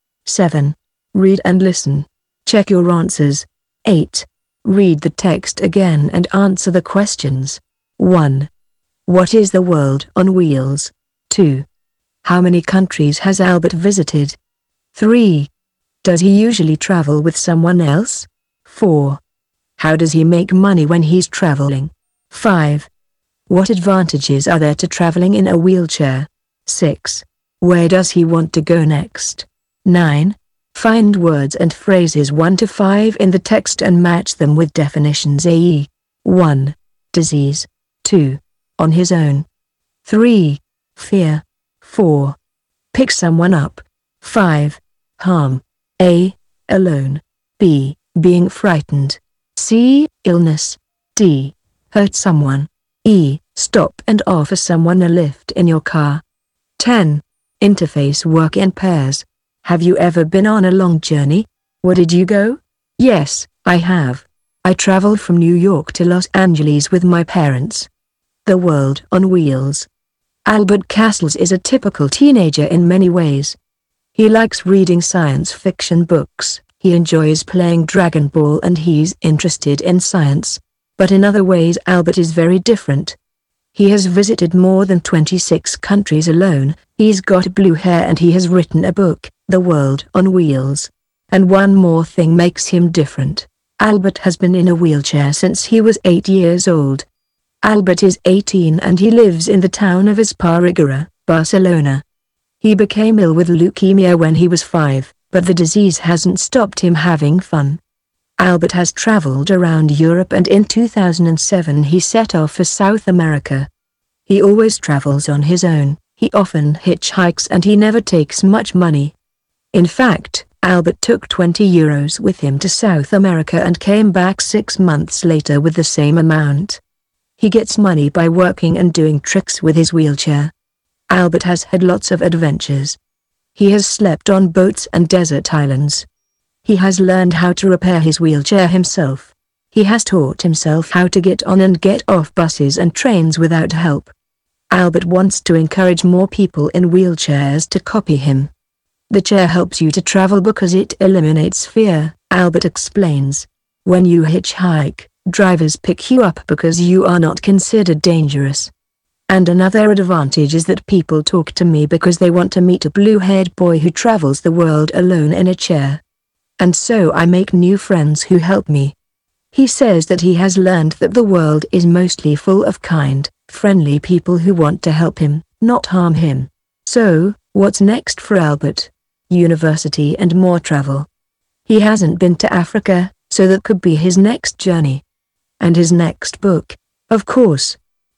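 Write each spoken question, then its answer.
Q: What is the world on wheels?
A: A book written by Albert

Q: How many countries has Albert visited?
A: More than 26

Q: Does he usually travel with someone else?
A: No, he always travels on his own

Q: How does he make money when he's traveling?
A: By working and doing tricks with his wheelchair

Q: What advantages are there to traveling in a wheelchair?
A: It eliminates fear; drivers pick him up because he's not considered dangerous, and people talk to him, so he makes new friends

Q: Where does he want to go next?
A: Africa (and university)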